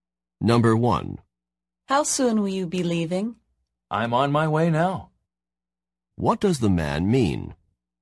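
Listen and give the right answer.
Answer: He is leaving now.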